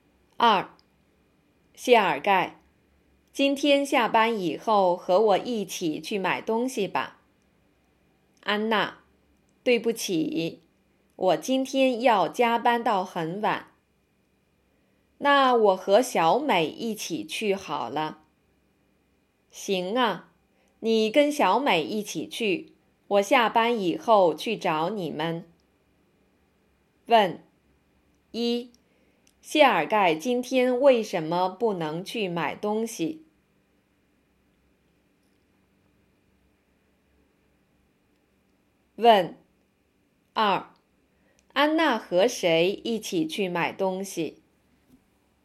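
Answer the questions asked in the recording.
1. 他要加班到很晚
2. 小美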